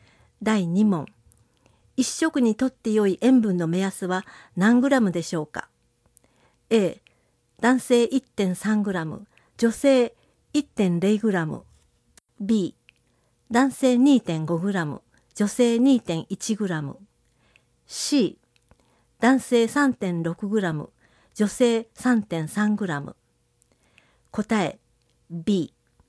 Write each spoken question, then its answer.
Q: 一食にとって良い塩分の目安は何グラムでしょうか?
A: 答え B。